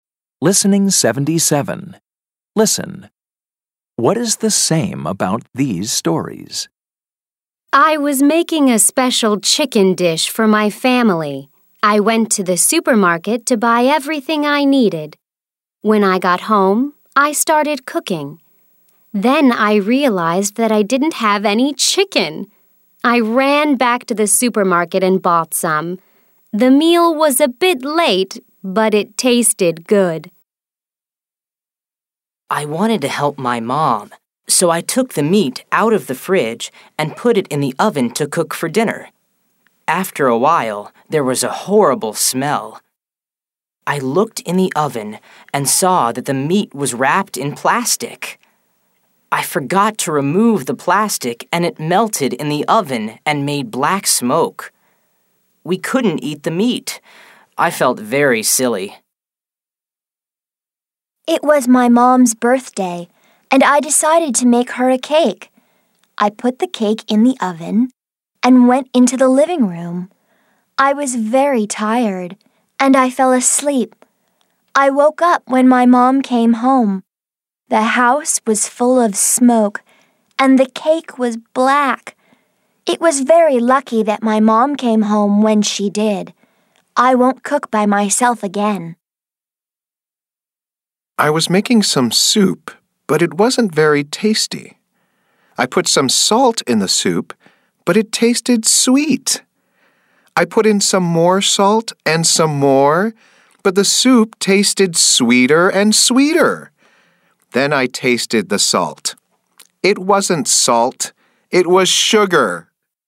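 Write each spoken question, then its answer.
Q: What is the same about these stories?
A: They are all about cooking mistakes/problems.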